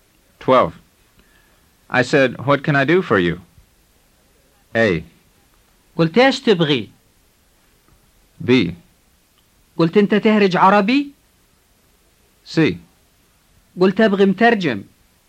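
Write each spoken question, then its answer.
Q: I said, what can I do for you?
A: A: قلت ايش تبغي؟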